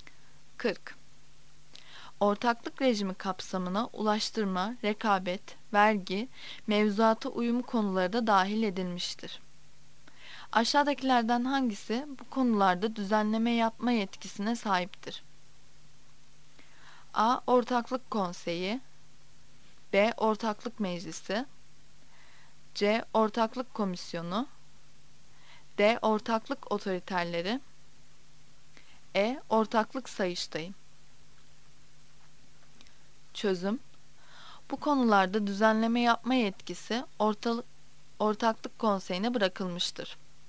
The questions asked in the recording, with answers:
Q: Aşağıdakilerden hangisi bu konularda düzenleme yapma yetkisine sahiptir?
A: Yanıt A'dır. A. Ortaklık Konseyi.